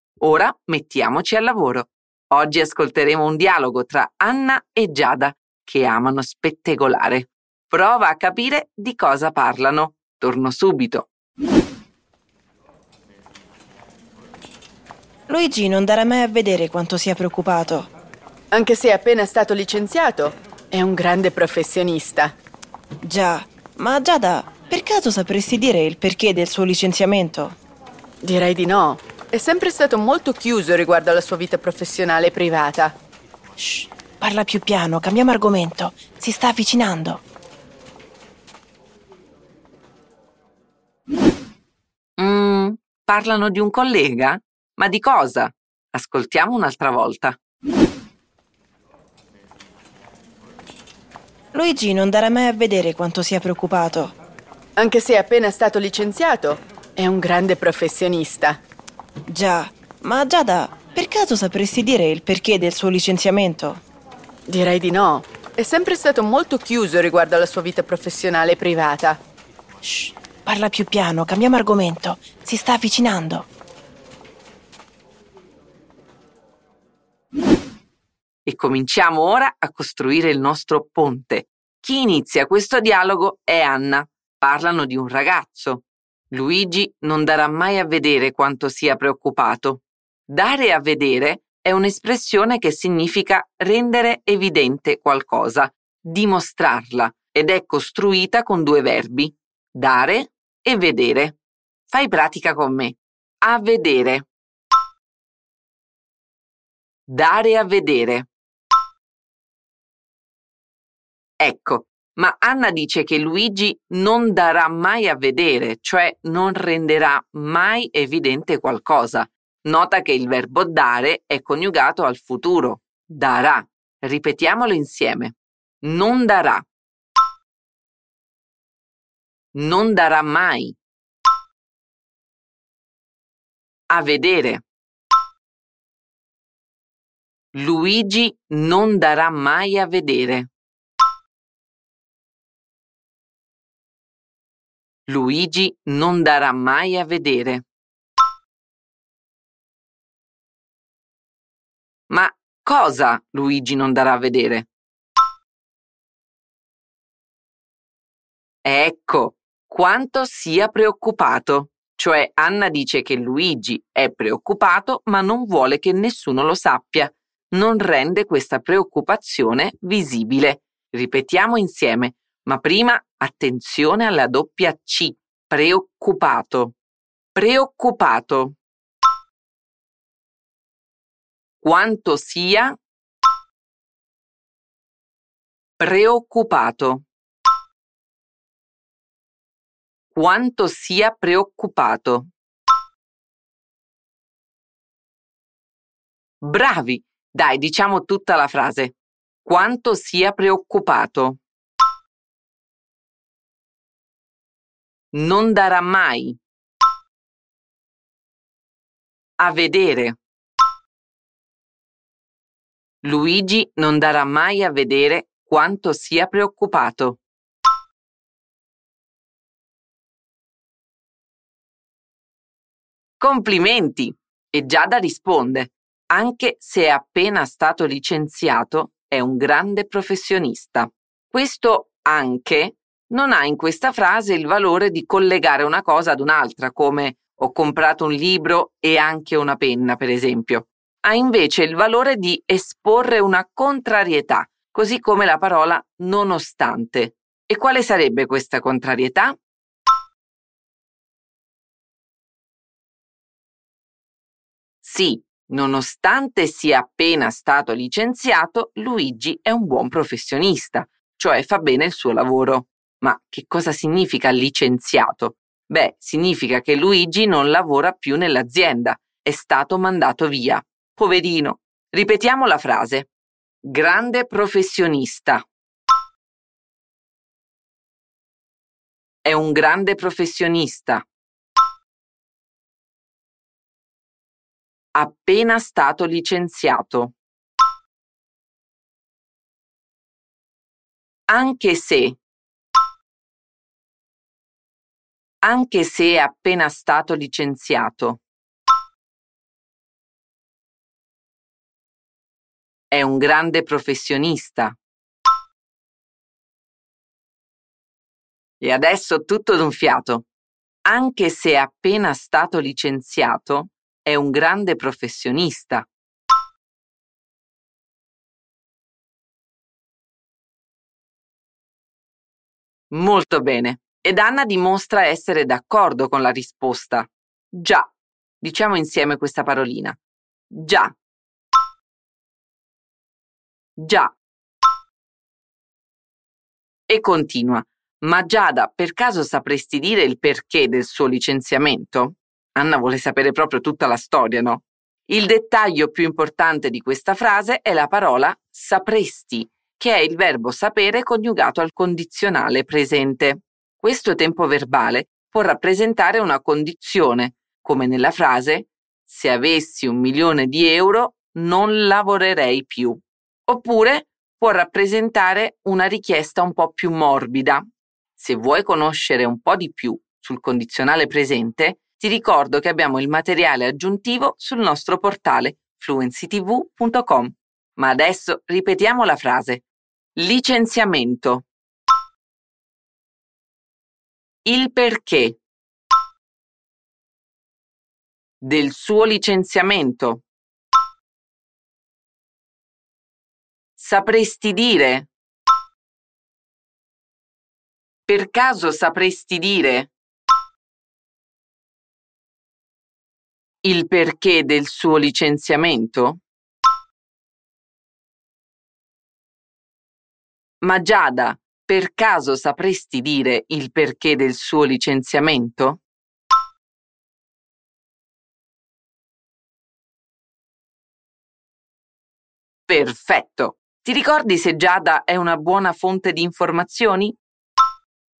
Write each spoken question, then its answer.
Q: Ti ricordi se Giada è una buona fonte di informazioni?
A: No, non lo è, perché risponde direi di no.